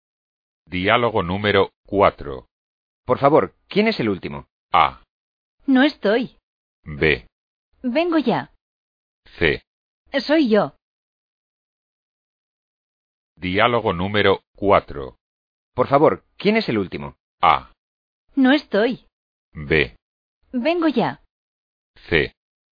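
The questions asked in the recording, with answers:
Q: Por favor, ¿quién es el último?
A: C: Soy yo.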